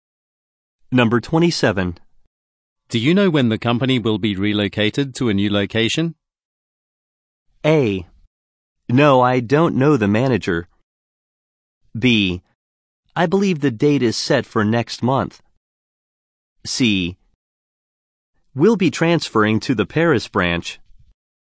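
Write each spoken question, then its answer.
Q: Do you know when the company will be relocated to a new location?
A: B: I believe the date is set for next month.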